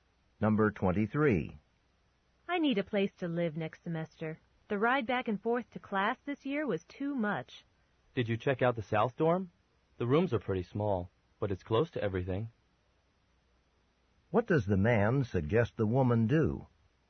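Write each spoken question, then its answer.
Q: What does the man suggest the woman do?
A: Look into living in the South Dorm.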